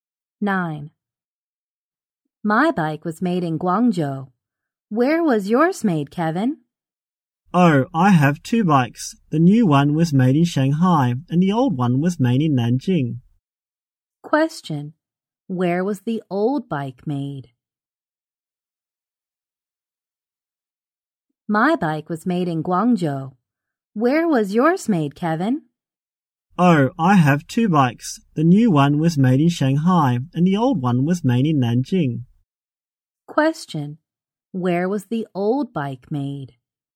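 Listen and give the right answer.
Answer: In Nanjing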